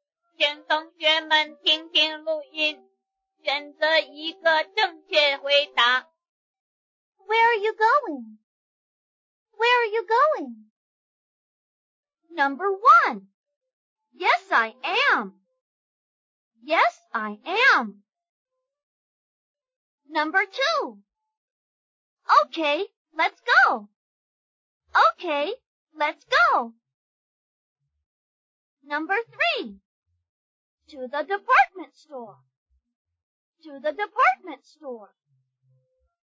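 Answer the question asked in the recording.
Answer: 3: To the department store.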